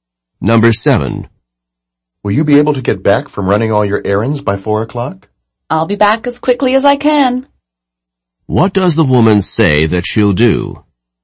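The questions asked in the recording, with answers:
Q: What does the woman say that she'll do?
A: Come back as quickly as she can.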